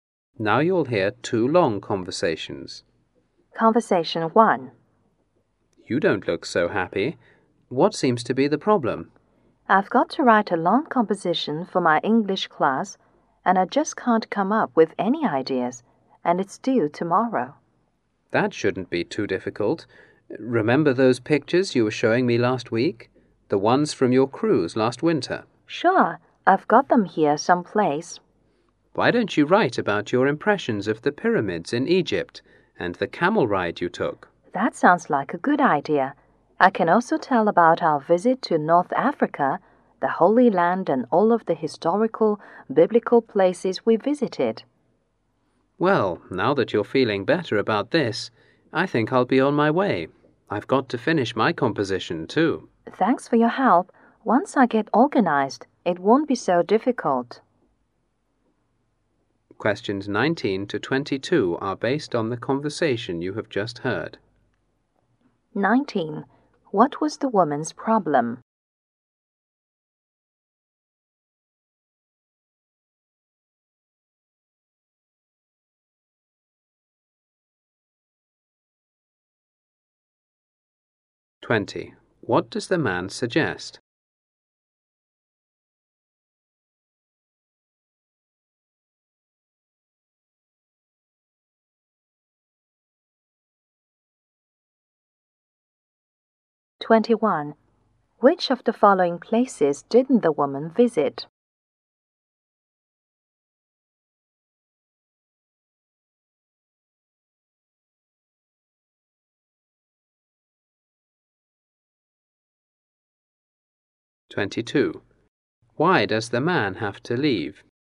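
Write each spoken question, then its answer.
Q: What was the woman's problem?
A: She couldn't think of ideas for a long English composition due tomorrow.

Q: What does the man suggest?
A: Write about her cruise, the pyramids and the camel ride.

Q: Why does the man have to leave?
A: He has to finish his own composition.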